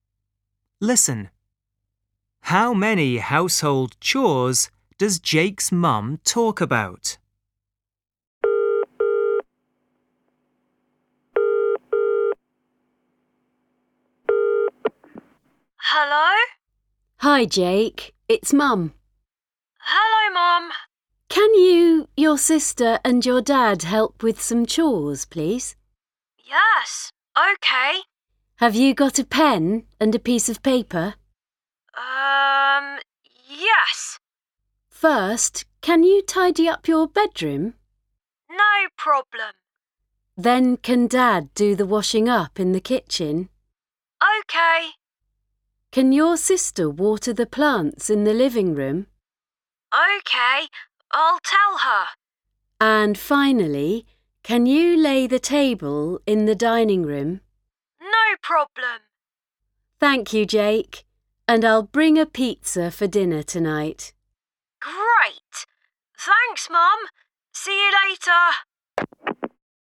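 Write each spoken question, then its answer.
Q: How many household chores does Jake's mum talk about?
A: Four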